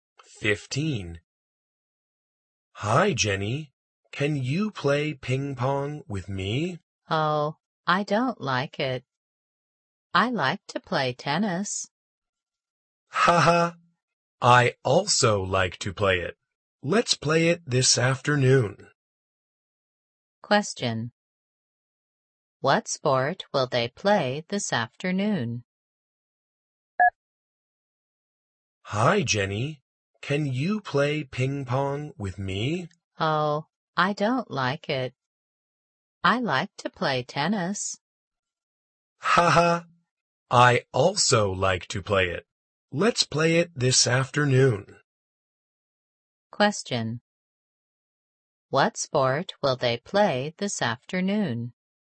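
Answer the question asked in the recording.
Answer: Tennis.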